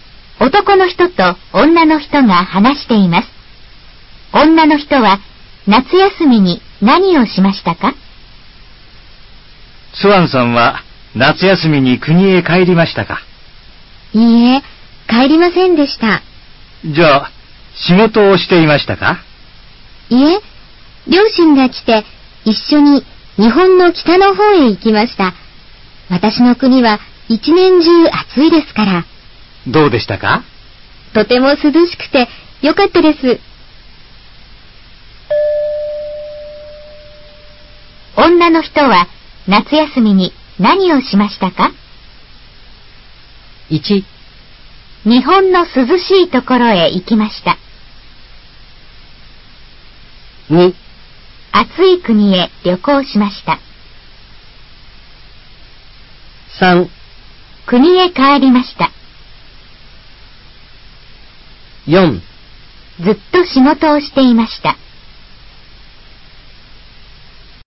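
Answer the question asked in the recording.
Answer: 1: 日本の涼しいところへ行きました。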